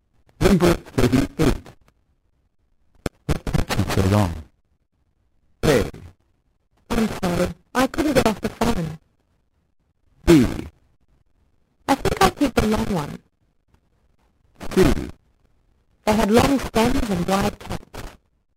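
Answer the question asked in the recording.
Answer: A: I'm sorry. I couldn't get off the phone.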